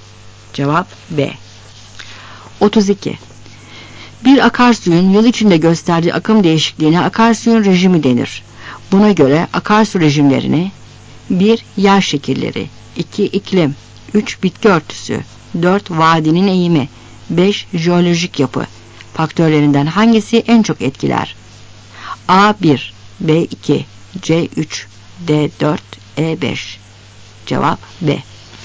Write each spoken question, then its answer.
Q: jeolojik yapı faktörlerinden hangisi en çok etkiler?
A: Cevap B.